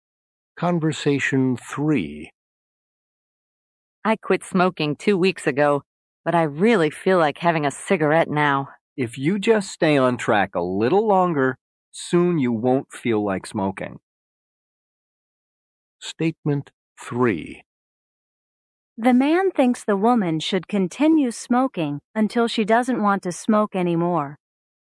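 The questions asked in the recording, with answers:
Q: The man thinks the woman should continue smoking until she doesn't want to smoke anymore.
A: False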